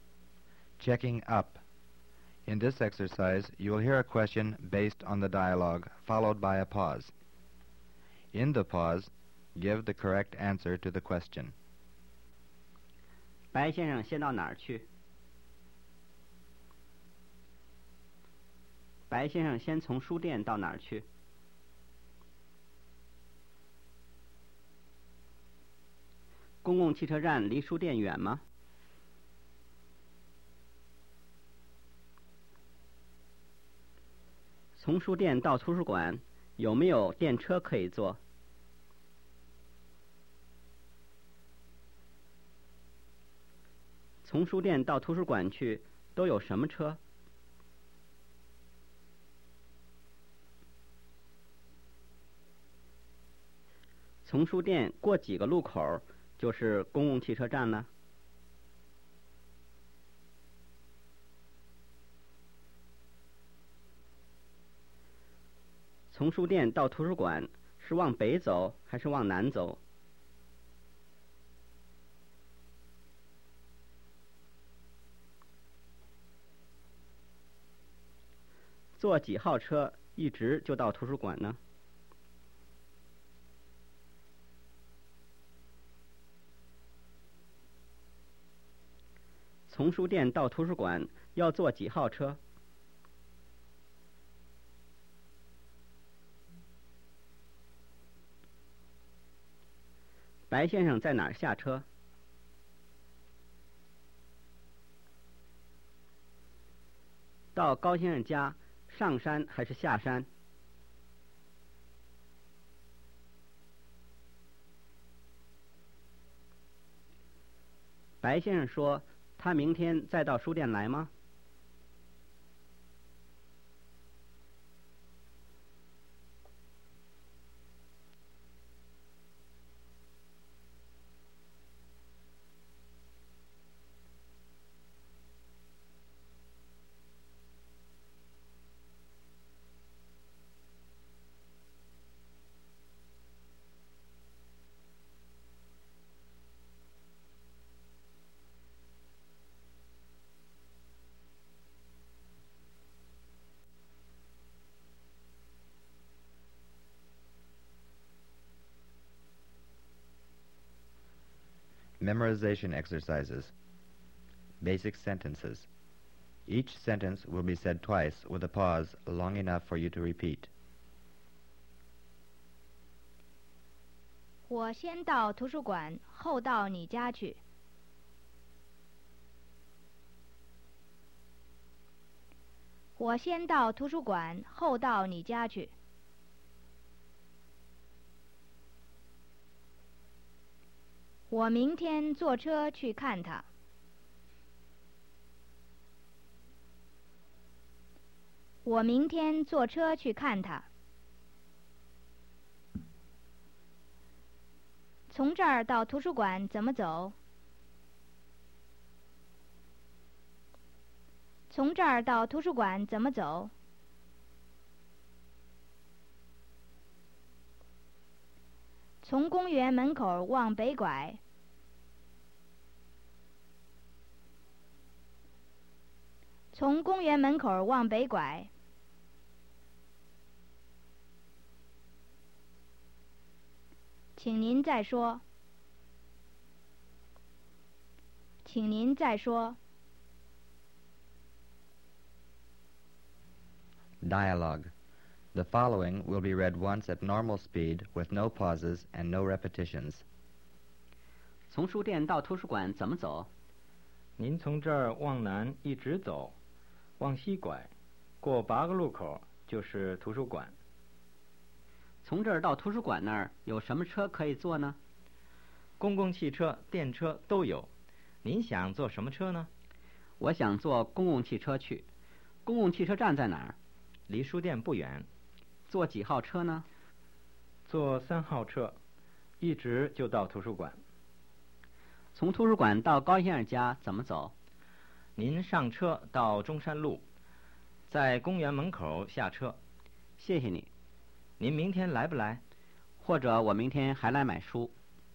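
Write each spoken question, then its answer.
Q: 公共汽车站离书店远吗?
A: 不远

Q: 从书店到图书馆去,都有什么车?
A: 公共汽车、电车都有

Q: 从书店到图书馆是往北走还是往南走?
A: 往南走

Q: 坐几号车一直就到图书馆呢?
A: 三号车

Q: 从书店到图书馆要坐几号车?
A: 三号车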